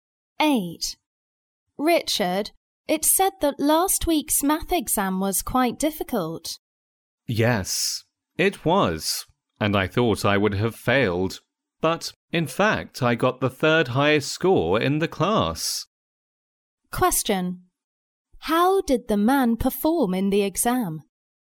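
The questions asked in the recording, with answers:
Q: How did the man perform in the exam?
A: Very well; he got the third highest score in the class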